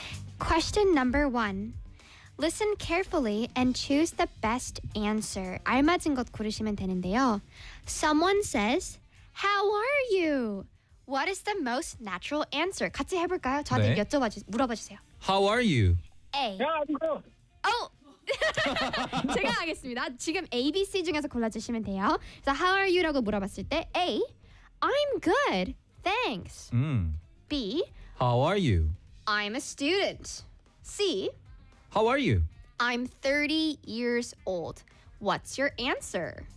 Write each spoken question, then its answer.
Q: Someone says, How are you? What is the most natural answer?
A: 예! 맞아요.